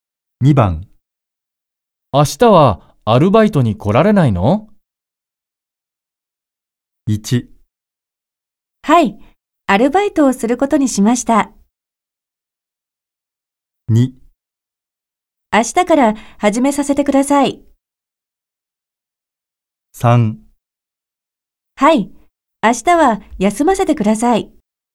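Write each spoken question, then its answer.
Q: 明日はアルバイトに来られないの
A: 3: はい、明日は休ませてください。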